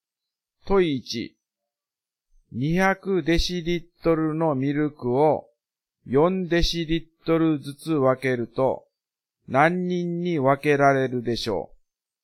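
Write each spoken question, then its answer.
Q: 200デシリットルのミルクを4デシリットルリットルずつ分けると何人に分けられるでしょう。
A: 50人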